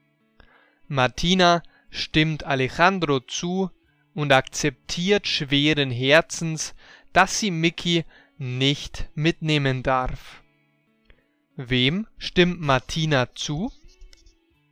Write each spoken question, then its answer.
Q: Wem stimmt Martina zu?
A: Sie stimmt Alejandro zu.